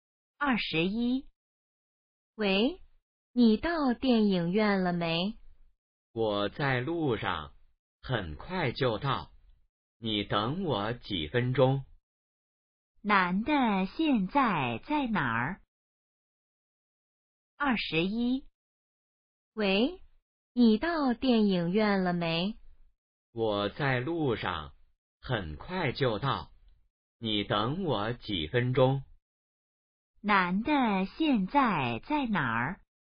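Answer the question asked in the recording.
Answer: 在路上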